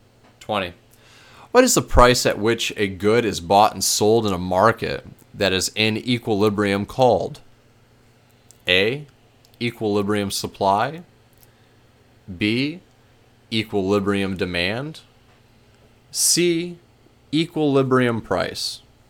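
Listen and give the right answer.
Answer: C: equilibrium price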